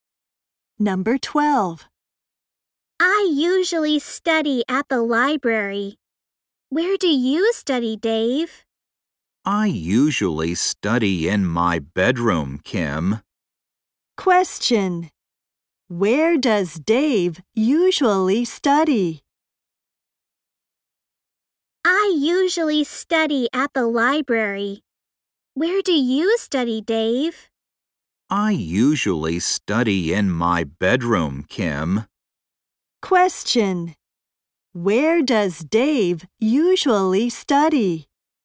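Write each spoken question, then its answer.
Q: Where does Dave usually study?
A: In his bedroom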